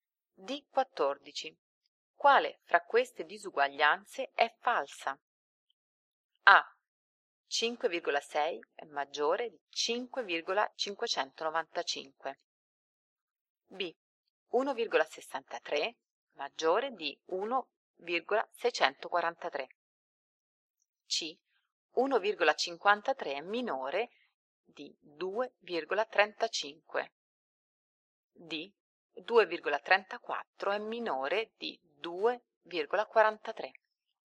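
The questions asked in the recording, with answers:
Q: Quale fra queste disuguaglianze è falsa?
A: B: 1,63 maggiore di 1,643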